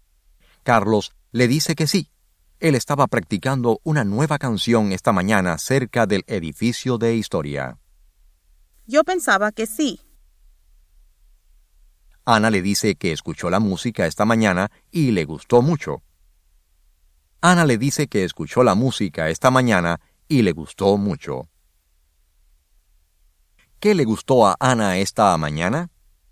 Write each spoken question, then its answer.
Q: ¿Qué le gustó a Ana esta mañana?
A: A Ana le gustó la nueva canción de Carlos.